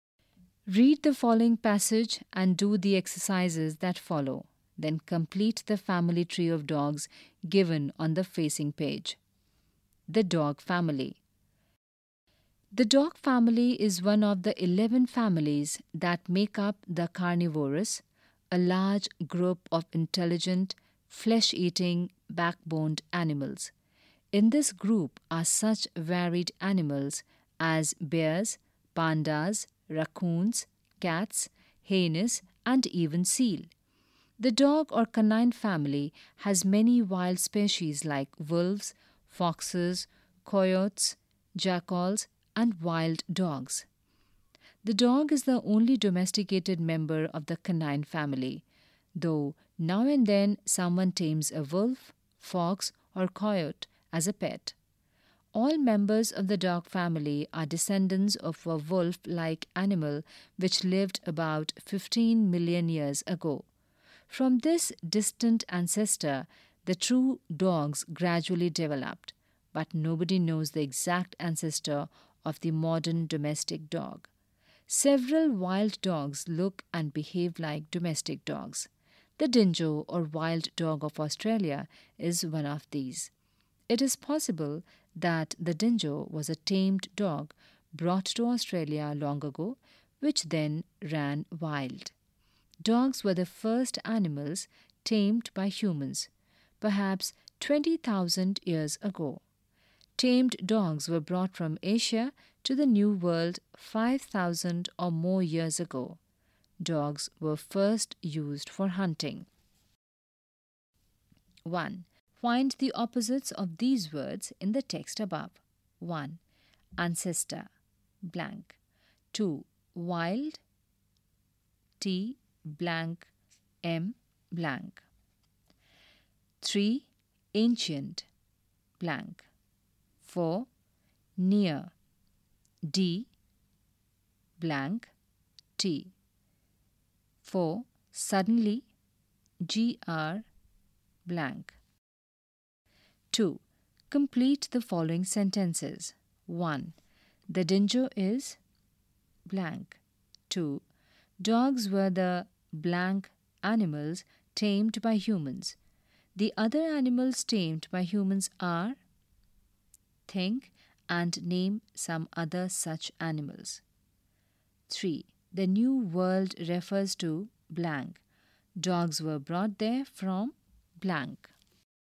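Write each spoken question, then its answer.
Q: Ancestor, blank.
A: descendant

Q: Wild, T, blank, M, blank.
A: tamed

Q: Ancient, blank.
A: modern

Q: Near, D, blank, T.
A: distant

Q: Suddenly, GR, blank.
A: gradually

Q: The Dingo is blank.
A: the wild dog of Australia

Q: Dogs were the blank animals tamed by humans.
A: first

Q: Dogs were brought there from blank.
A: Asia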